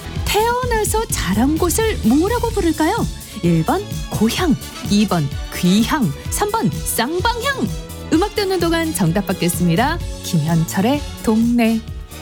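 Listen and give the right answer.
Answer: 1번: 고향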